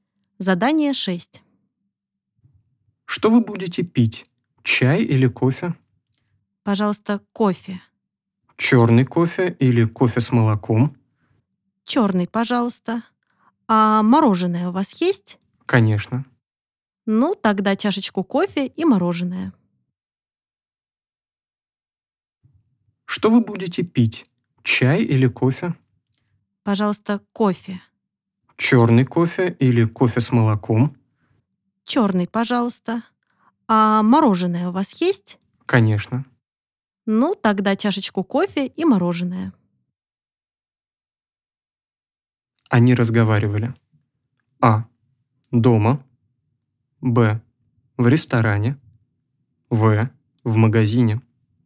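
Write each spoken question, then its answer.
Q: Они разговаривали.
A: Б: В ресторане.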